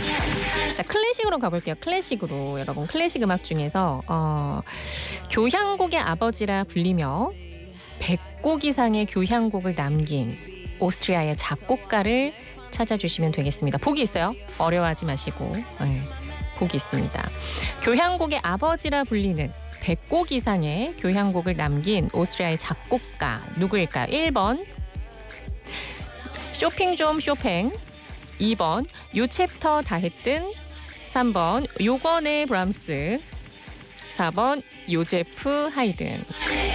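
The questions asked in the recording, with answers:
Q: 교향곡의 아버지라 불리는 100곡 이상의 교향곡을 남긴 오스트리아의 작곡가 누구일까요?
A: 4: 요제프 하이든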